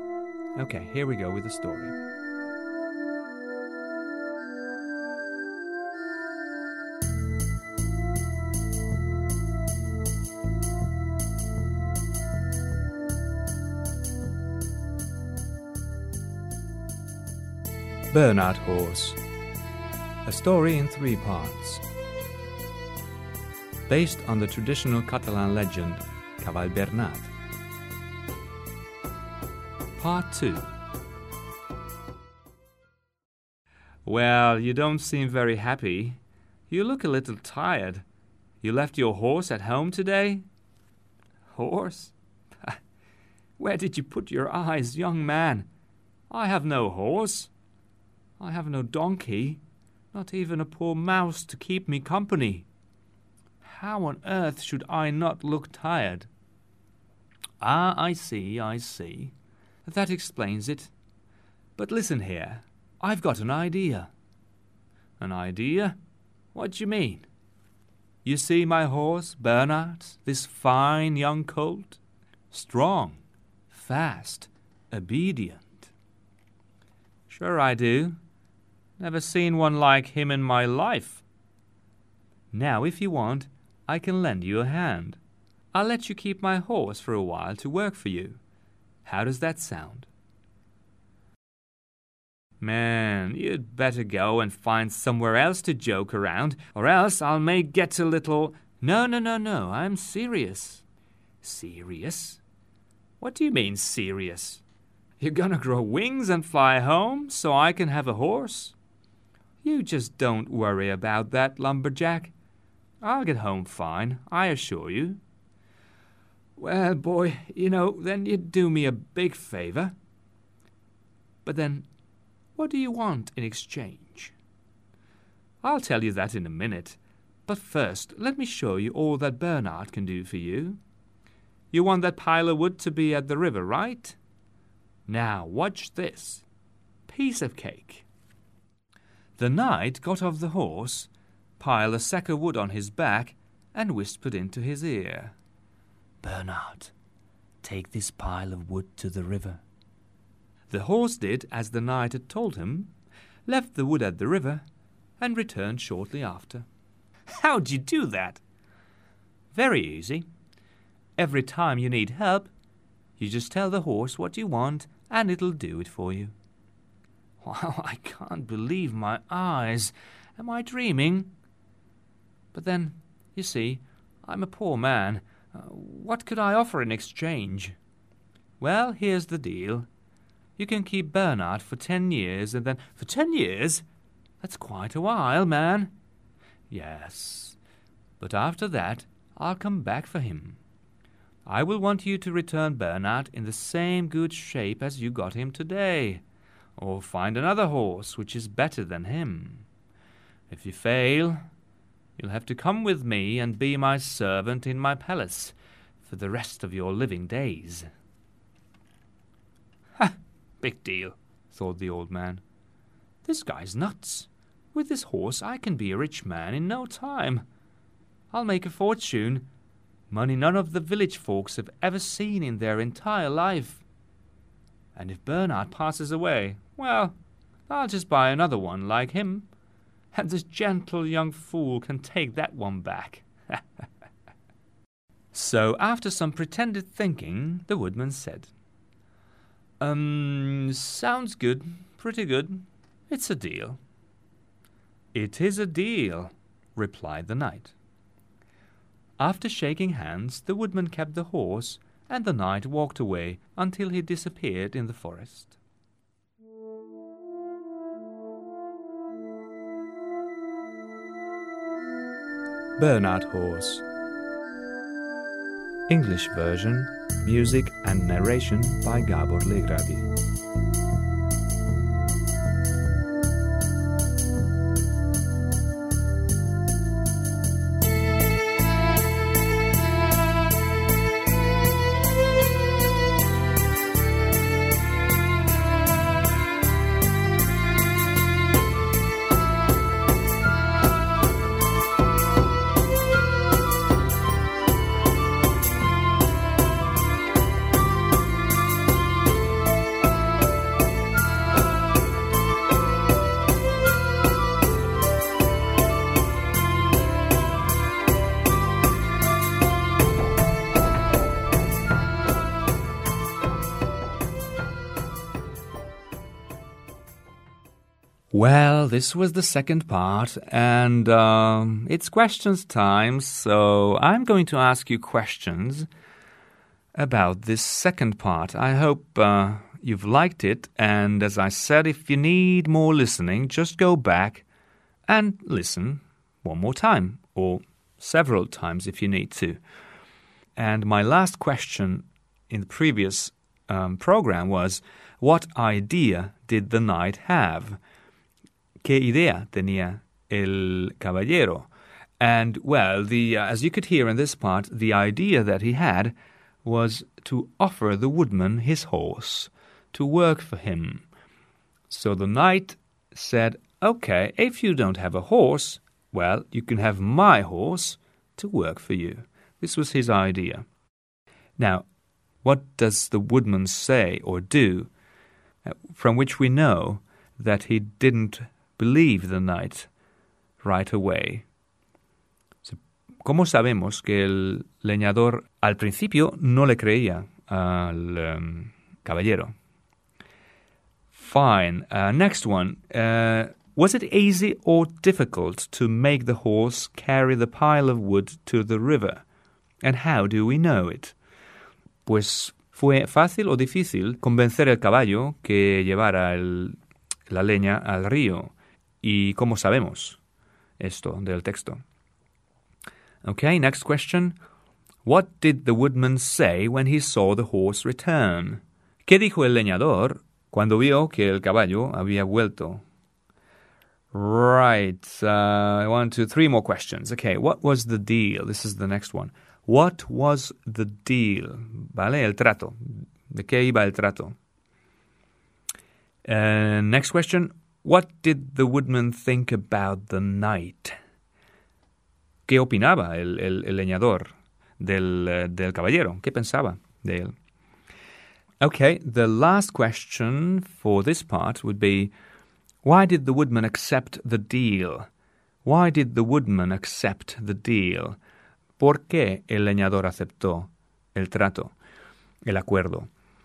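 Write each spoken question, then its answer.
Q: what does the woodman say or do, from which we know that he didn't believe the knight right away?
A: He tells the knight to go and joke around somewhere else and asks if he'll grow wings and fly home

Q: Was it easy or difficult to make the horse carry the pile of wood to the river?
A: Easy; the knight said 'piece of cake' and just whispered into its ear

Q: What did the woodman say when he saw the horse return?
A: How'd you do that? I can't believe my eyes. Am I dreaming?

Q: what was the deal?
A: He keeps Bernard for 10 years, then returns him in the same good shape or a better horse; if not, he becomes the knight's servant for life

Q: What did the woodman think about the knight?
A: That he was nuts, a fool

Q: why did the woodman accept the deal?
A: He thought he could get rich with the horse and just buy another one if Bernard died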